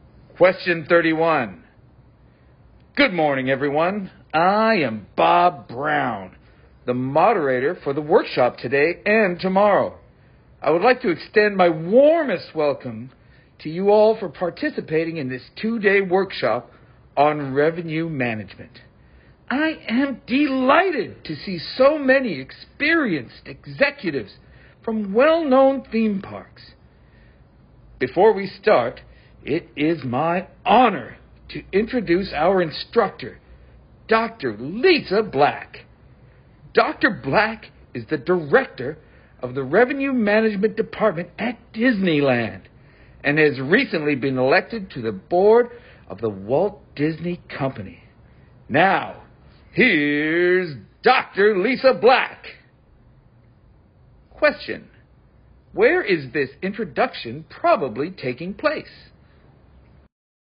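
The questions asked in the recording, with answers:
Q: where is this introduction probably taking place?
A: At a workshop on revenue management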